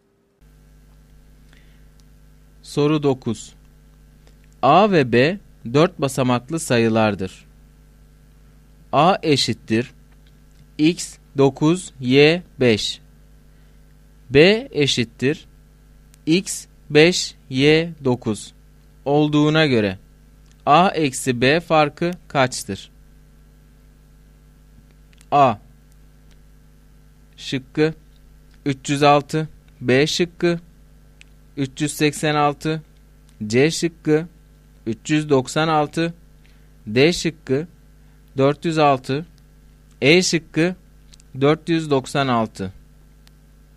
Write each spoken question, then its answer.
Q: A eşittir x 9, y 5. B eşittir x 5, y 9 olduğuna göre A eksi B farkı kaçtır?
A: Doğru cevap C şıkkı.